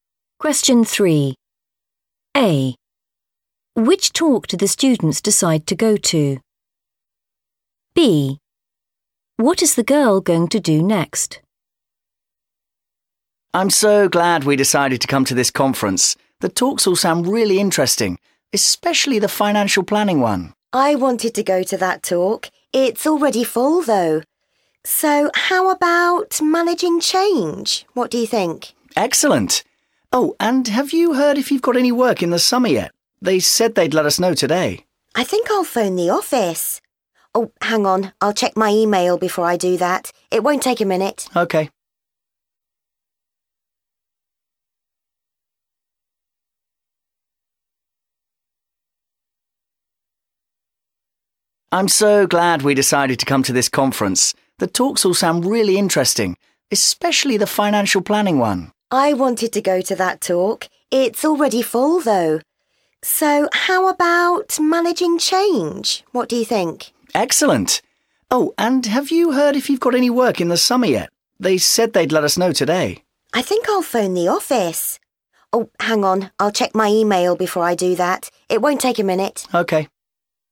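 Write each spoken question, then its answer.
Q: Which talk do the students decide to go to?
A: managing change

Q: What is the girl going to do next?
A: check her email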